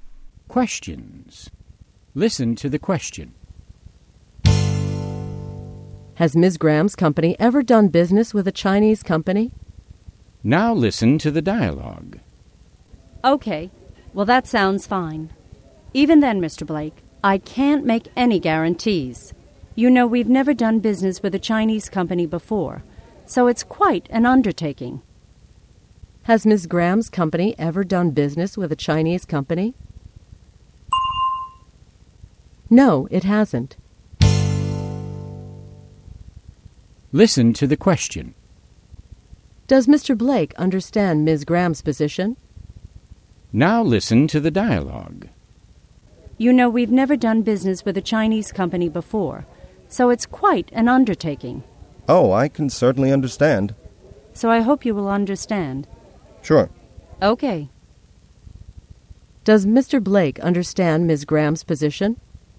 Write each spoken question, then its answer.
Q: Has Ms. Graham's company ever done business with a Chinese company?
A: No, it hasn't.